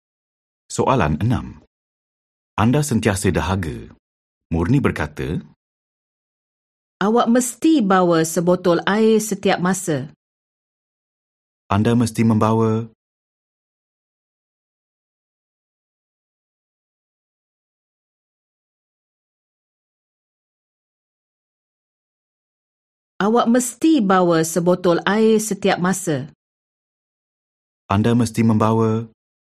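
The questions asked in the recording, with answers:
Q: Anda mesti membawa.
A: sebotol air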